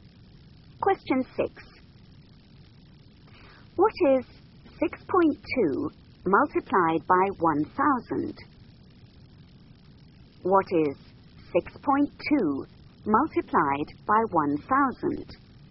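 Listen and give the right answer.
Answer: 6,200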